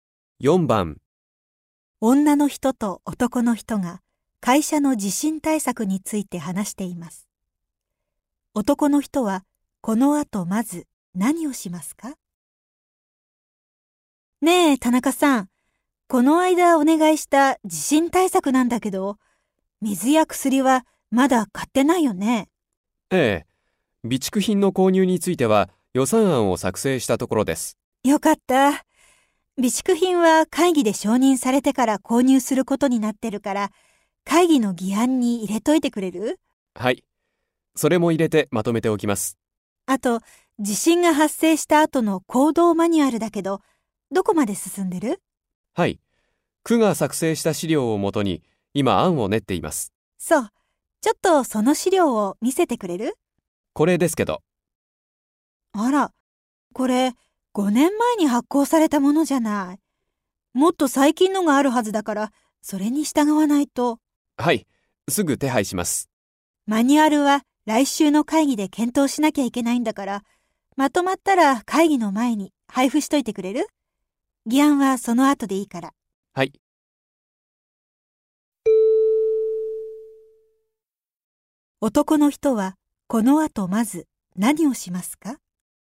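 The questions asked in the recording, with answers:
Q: 男の人はこの後まず何をしますか?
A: 区の最新の資料を手配する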